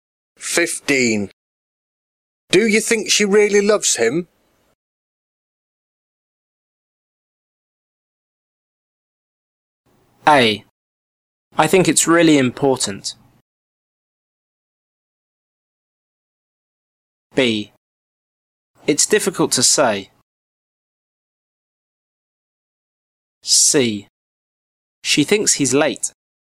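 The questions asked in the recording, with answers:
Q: Do you think she really loves him?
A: B: It's difficult to say.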